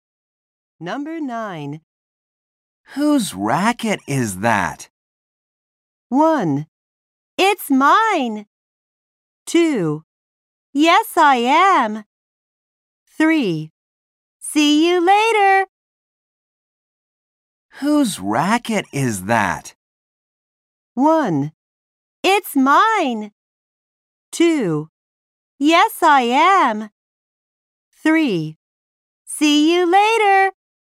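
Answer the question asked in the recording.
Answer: 1: It's mine.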